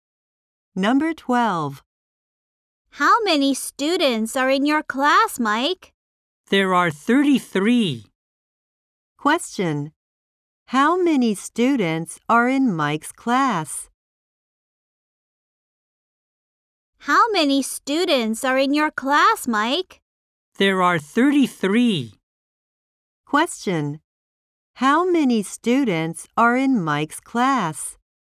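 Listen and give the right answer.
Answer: 33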